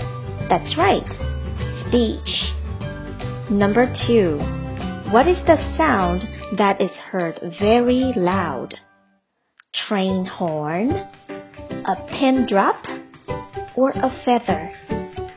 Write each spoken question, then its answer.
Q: what is the sound that is heard very loud?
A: That's right. The answer is train horn.